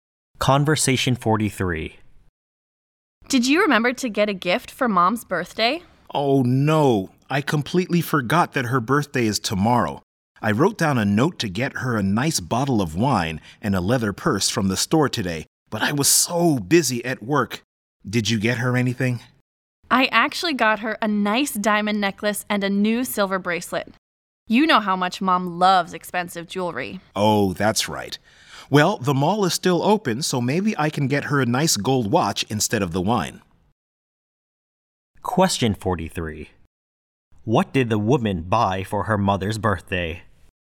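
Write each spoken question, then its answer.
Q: What did the woman buy for her mother's birthday?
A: A diamond necklace and a silver bracelet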